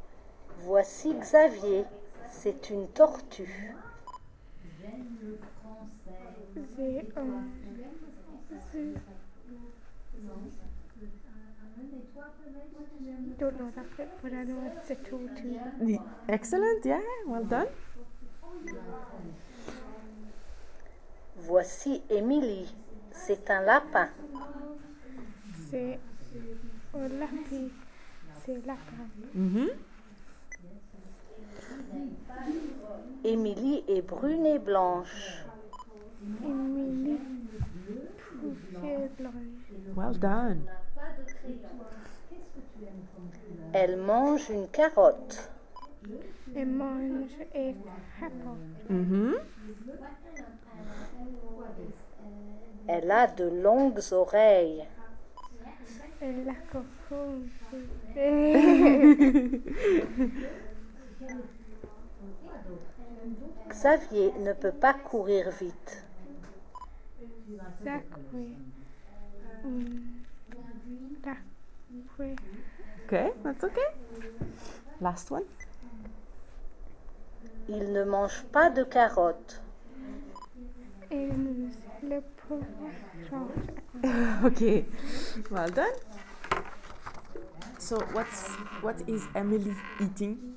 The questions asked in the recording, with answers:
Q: So what is Emily eating?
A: Carrot.